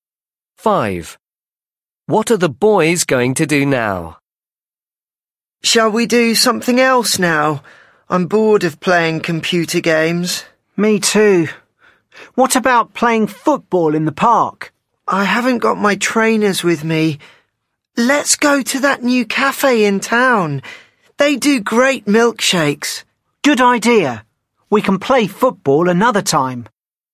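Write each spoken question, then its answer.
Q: What are the boys going to do now?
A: go to a new cafe in town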